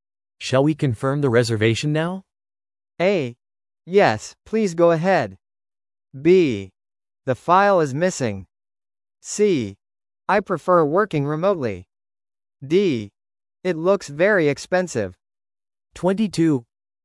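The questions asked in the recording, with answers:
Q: Shall we confirm the reservation now?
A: A: Yes, please go ahead.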